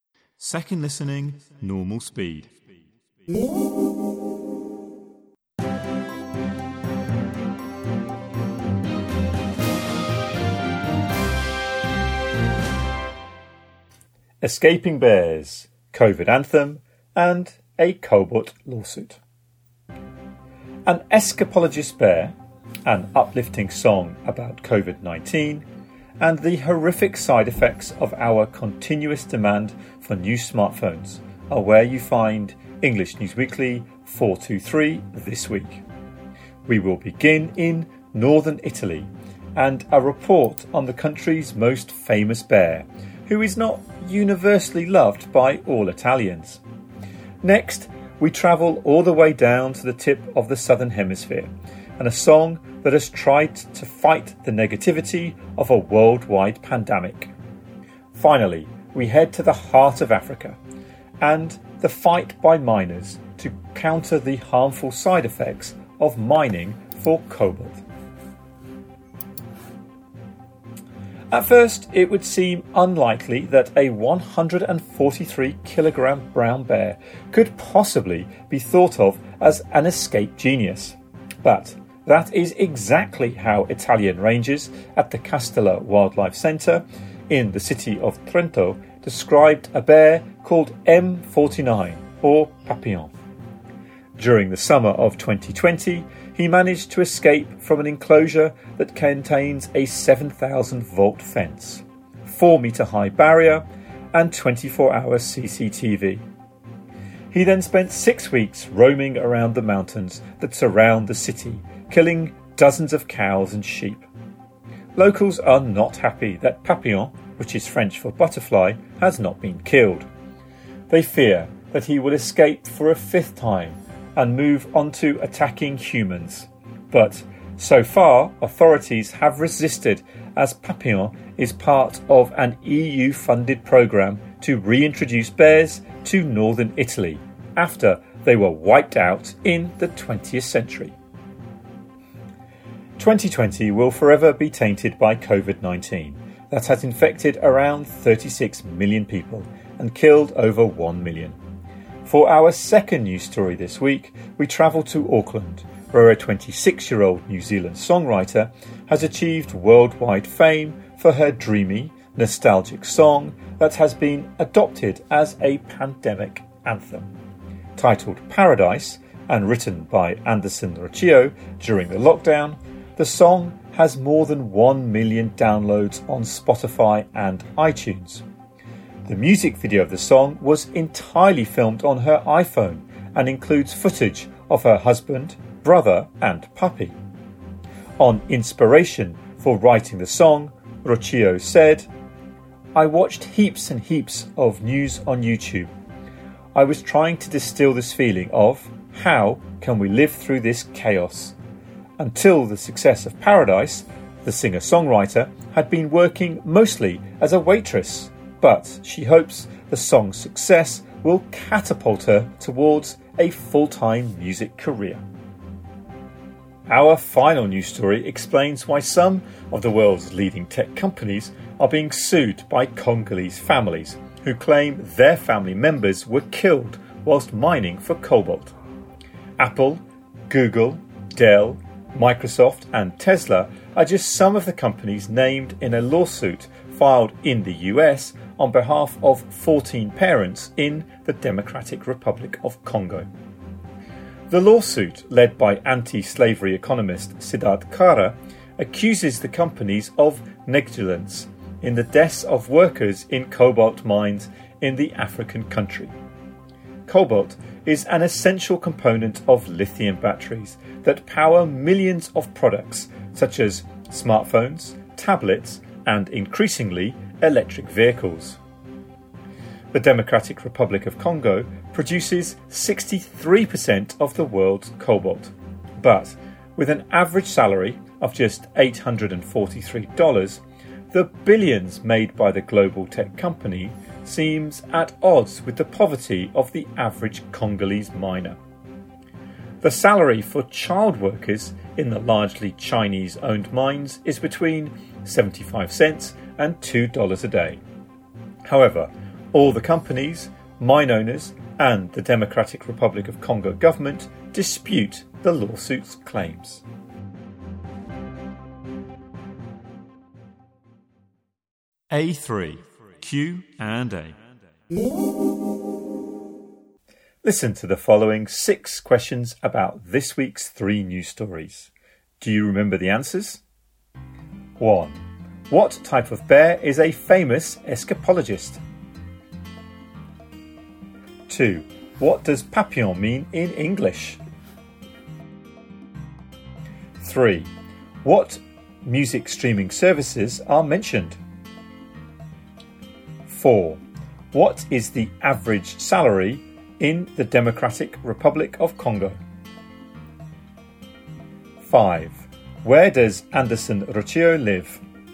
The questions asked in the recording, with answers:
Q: What type of bear is a famous escapologist?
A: 1 brown bear

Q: What does papillon mean in English?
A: 2 butterfly

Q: What music streaming services are mentioned?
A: 3 Spotify or iTunes

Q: What is the average salary in the Democratic Republic of Congo?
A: 4 $843

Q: Where does Anderson Rocio live?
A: 5 Auckland, New Zealand